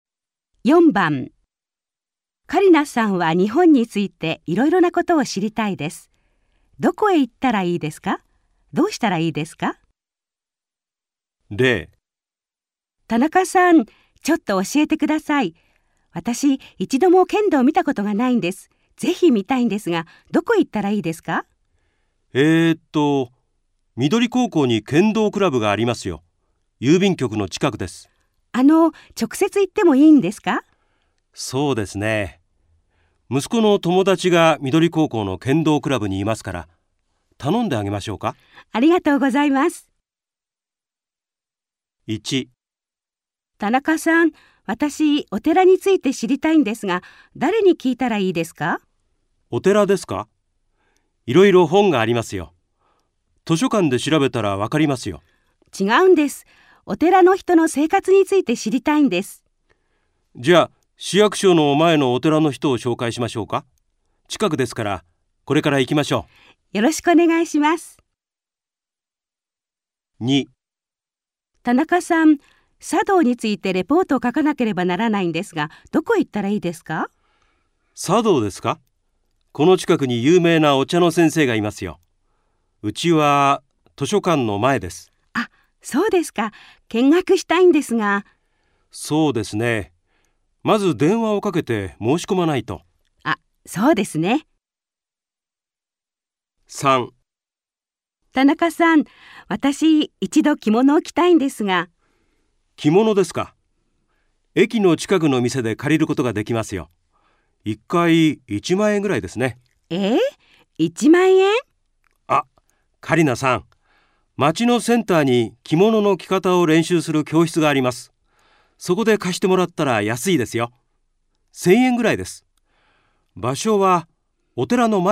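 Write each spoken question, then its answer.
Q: どこへ行ったらいいですか?どうしたらいいですか?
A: 市役所の前のお寺へ行って、お寺の人に話を聞く(田中さんが紹介してくれる)

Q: どこへ行ったらいいですか?どうしたらいいですか?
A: 図書館の前のお茶の先生のうちへ行く。まず電話をかけて申し込む

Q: どこへ行ったらいいですか?どうしたらいいですか?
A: お寺の前の町のセンターの教室へ行って、着物を借りる(1000円ぐらい)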